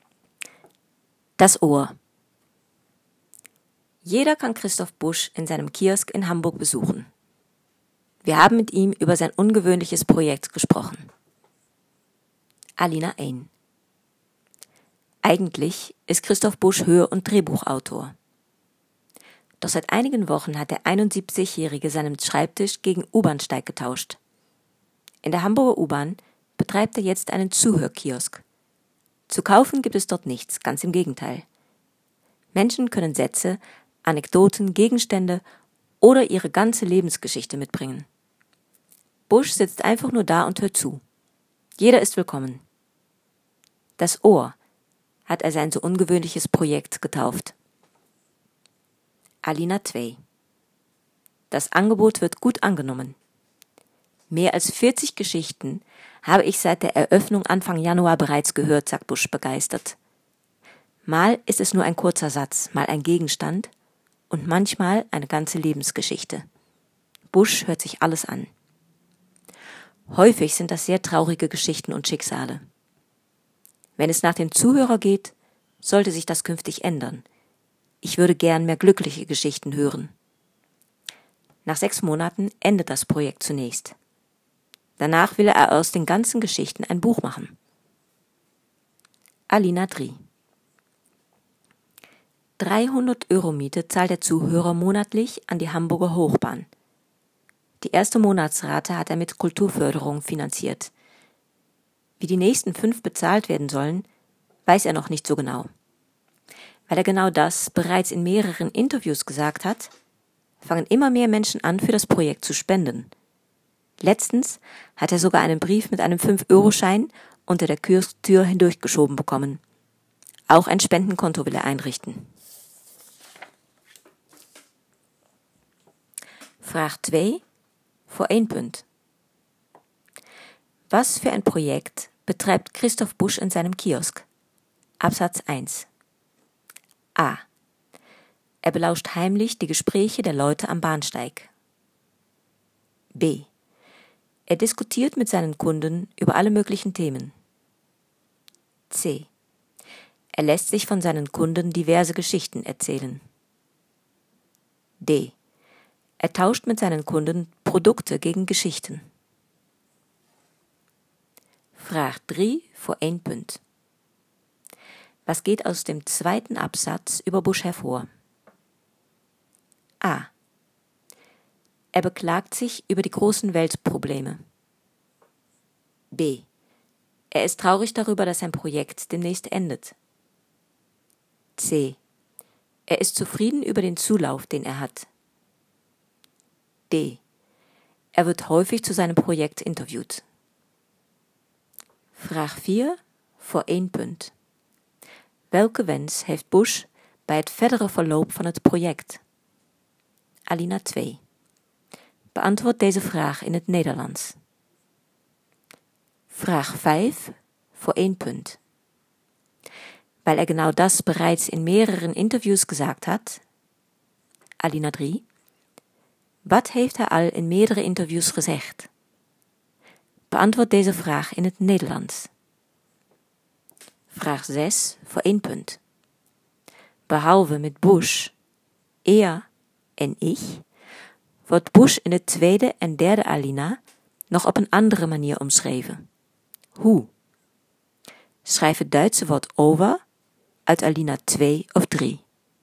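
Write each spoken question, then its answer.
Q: Was für ein Projekt betreibt Christoph Busch in seinem Kiosk?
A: C: Er lässt sich von seinen Kunden diverse Geschichten erzählen.

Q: Was geht aus dem 2. Absatz über Busch hervor?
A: C: Er ist zufrieden über den Zulauf, den er hat.

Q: wat heeft hij al in meerdere interviews gezegd?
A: Dat hij nog niet precies weet hoe hij de huur voor de volgende 5 maanden moet betalen.

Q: Behalve met Busch, er en ich, wordt Busch in de tweede en derde Alina nog op een andere manier omschreven. Hoe?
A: Zuhörer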